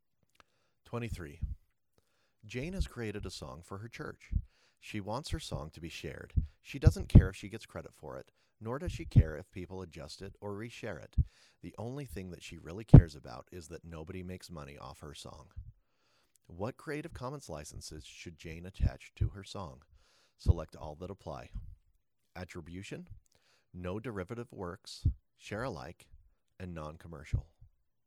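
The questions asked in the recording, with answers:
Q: What Creative Commons licenses should Jane attach to her song?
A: non-commercial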